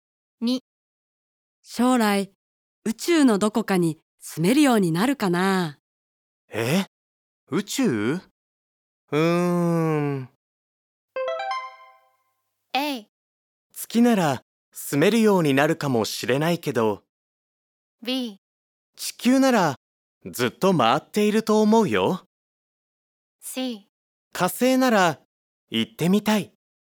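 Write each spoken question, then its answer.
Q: 将来宇宙のどこかに住めるようになるかな。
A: A: 月なら住めるようになるかもしれないけど、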